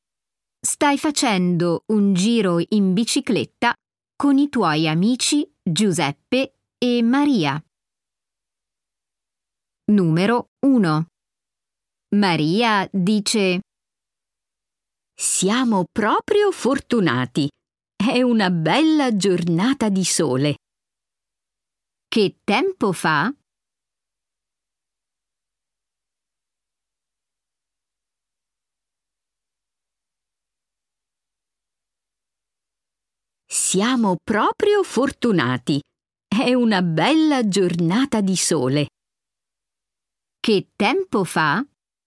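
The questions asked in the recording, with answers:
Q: Che tempo fa?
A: C'è il sole, è una bella giornata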